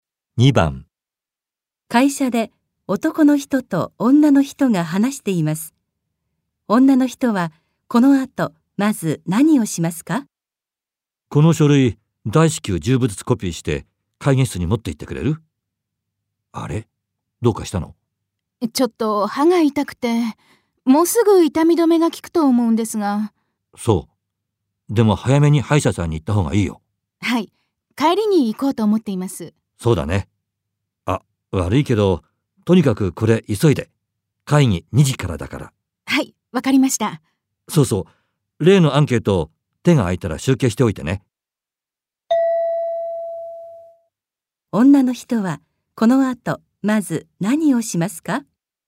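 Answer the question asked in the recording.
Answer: 書類をコピーして会議室に持って行く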